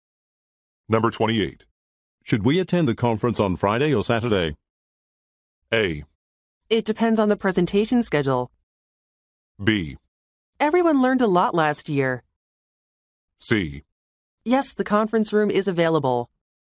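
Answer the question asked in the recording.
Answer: A: It depends on the presentation schedule.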